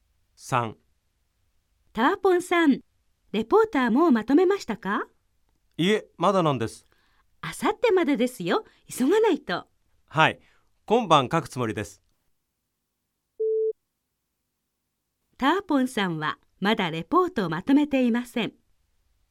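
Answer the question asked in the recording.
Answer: ○(正しい)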